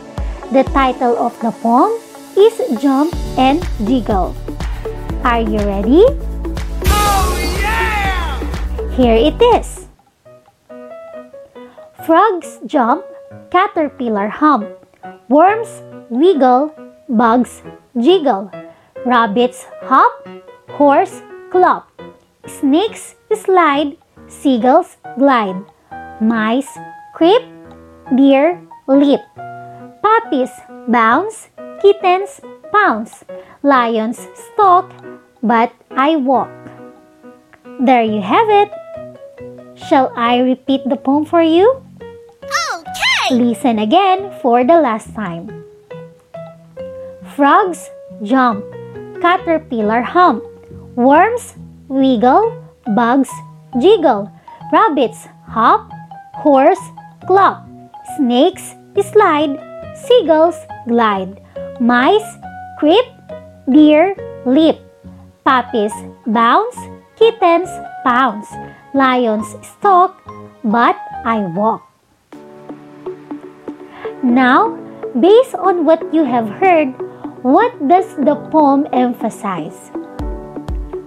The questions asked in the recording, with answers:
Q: Now, based on what you have heard, what does the poem emphasize?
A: It tells about the action of the animals.